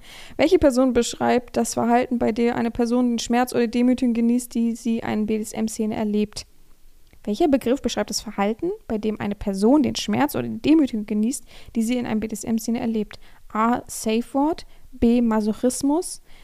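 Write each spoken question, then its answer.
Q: Welcher Begriff beschreibt das Verhalten, bei dem eine Person den Schmerz oder die Demütigung genießt, die sie in einem BDSM-Szene erlebt?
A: B: Masochismus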